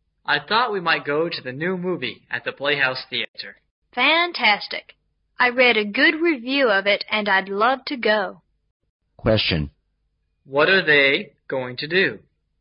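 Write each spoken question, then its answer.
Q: What are they going to do?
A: Go to the new movie at the Playhouse Theater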